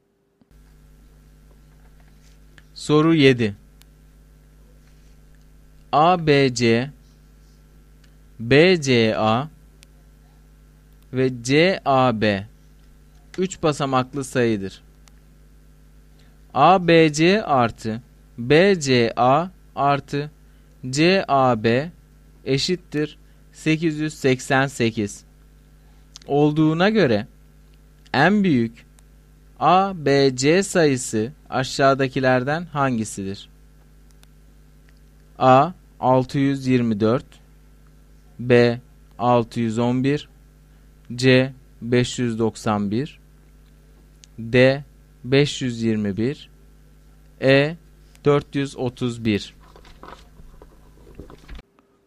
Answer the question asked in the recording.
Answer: Doğru cevap B şıkkı.